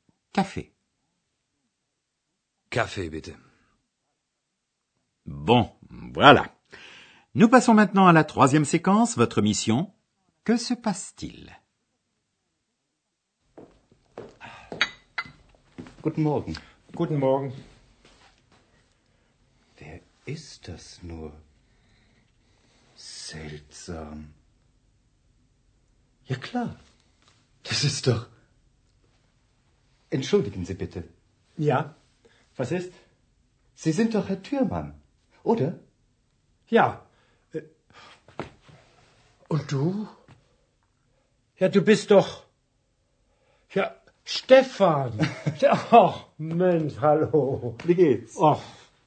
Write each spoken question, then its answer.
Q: Que se passe-t-il?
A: Oui, il semble que le docteur Thurman a rencontré un vieil ami qu'il n'avait pas vu depuis longtemps.